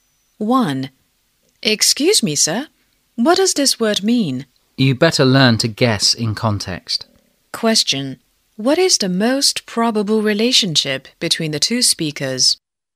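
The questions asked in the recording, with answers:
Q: What is the most probable relationship between the two speakers?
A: Student and teacher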